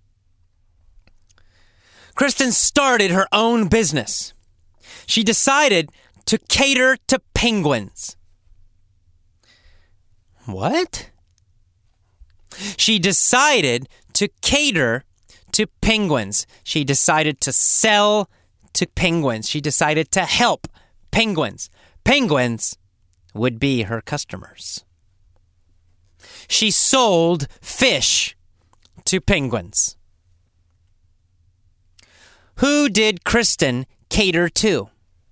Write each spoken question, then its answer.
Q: Who did Kristen cater to?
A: She catered to penguins.